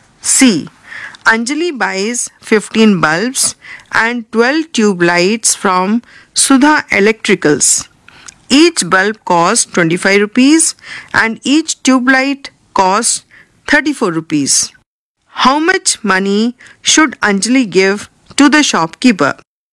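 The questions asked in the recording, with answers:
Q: How much money should Anjali give to the shopkeeper?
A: 783 rupees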